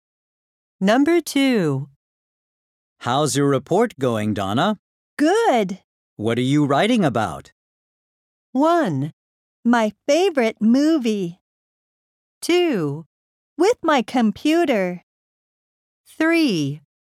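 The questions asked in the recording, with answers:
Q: What are you writing about?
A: 1: My favorite movie.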